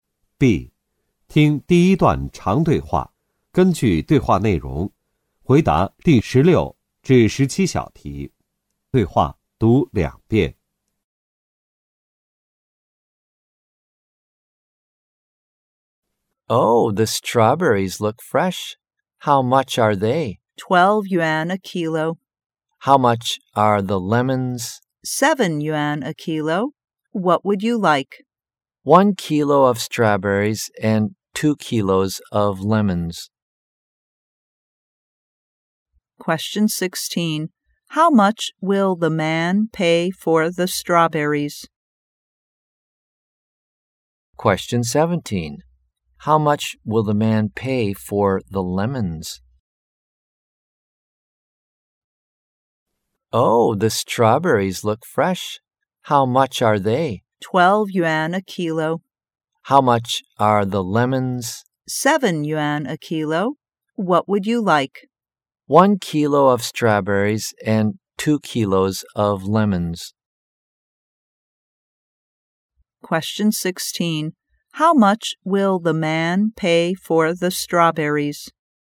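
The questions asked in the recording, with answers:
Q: How much will the man pay for the strawberries?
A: 12 yuan

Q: How much will the man pay for the lemons?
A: 14 yuan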